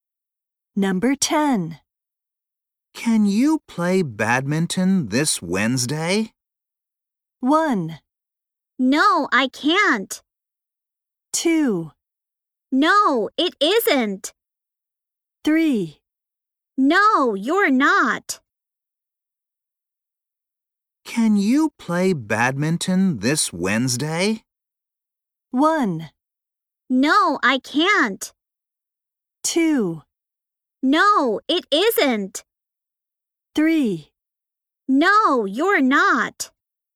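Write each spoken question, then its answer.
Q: Can you play badminton this Wednesday?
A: 1: No, I can't.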